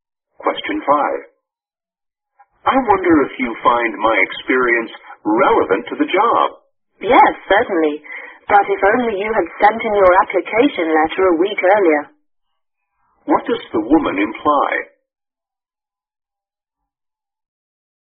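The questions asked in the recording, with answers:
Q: What does the woman imply?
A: The man applied too late for the job.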